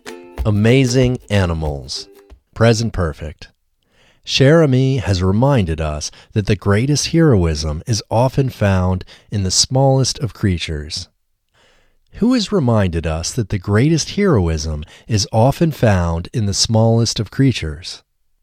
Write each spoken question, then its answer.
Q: Who has reminded us that the greatest heroism is often found in the smallest of creatures?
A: Cher Ami has reminded us that the greatest heroism is often found in the smallest of creatures.